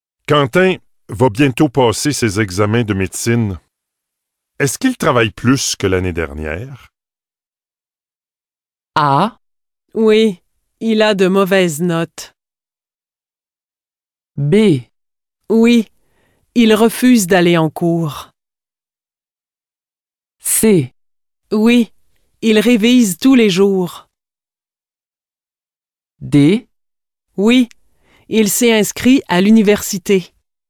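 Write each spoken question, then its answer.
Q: Est-ce qu'il travaille plus que l'année dernière?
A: C: Oui, il révise tous les jours.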